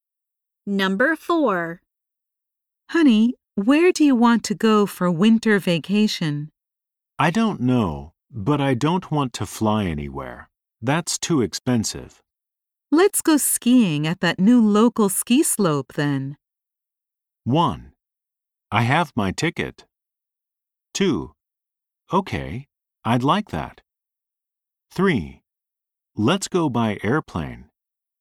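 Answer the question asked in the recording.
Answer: 2: Okay, I'd like that.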